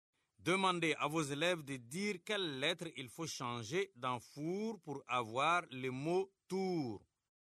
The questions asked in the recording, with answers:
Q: Demandez à vos élèves de dire quelle lettre il faut changer dans four pour avoir le mot tour.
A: Monsieur, je fasse le F et j'écris un T.